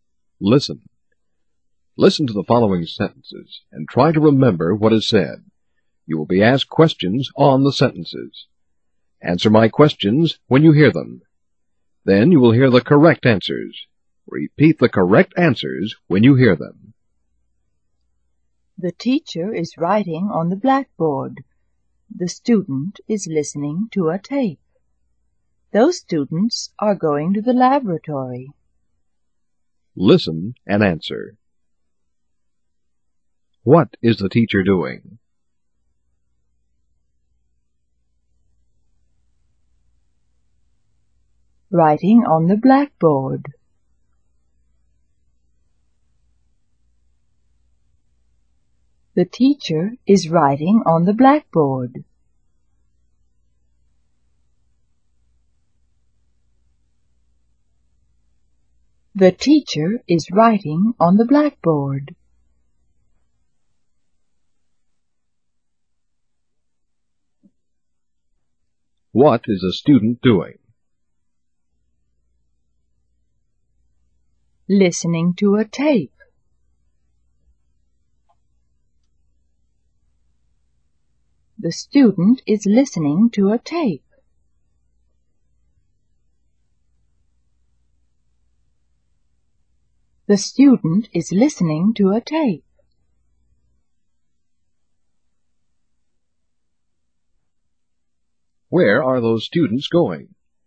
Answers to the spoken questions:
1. Writing on the blackboard.
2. Listening to a tape. The student is listening to a tape.
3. To the laboratory. Those students are going to the laboratory.